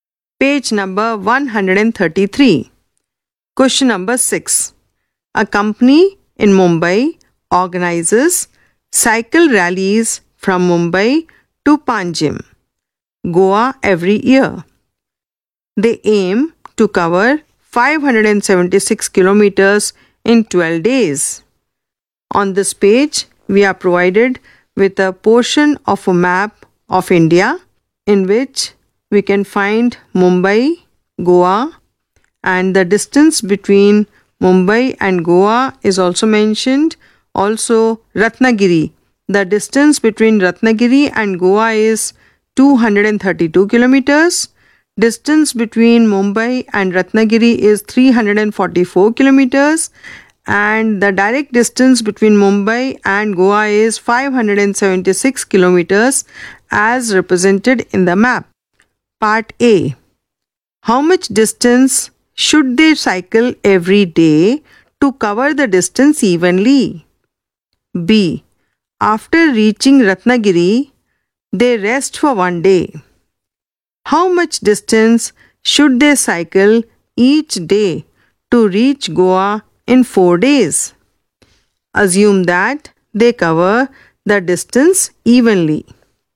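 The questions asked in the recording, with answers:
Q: How much distance should they cycle every day to cover the distance evenly?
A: 48 km per day

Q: How much distance should they cycle each day to reach Goa in 4 days?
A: 58 km per day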